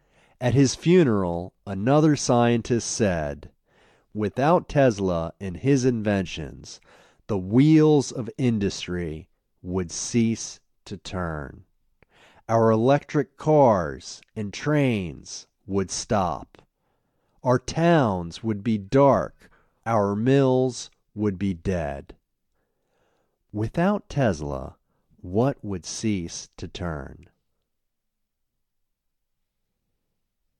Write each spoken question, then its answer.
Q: Without Tesla, what would cease to turn?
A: Without Tesla, the wheels of industry would cease to turn.